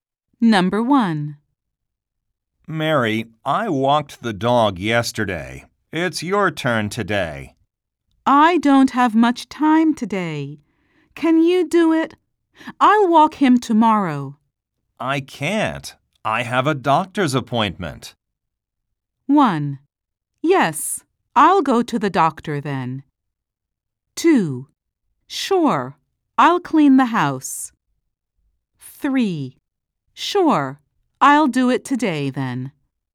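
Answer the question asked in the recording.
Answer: 3: Sure, I'll do it today then.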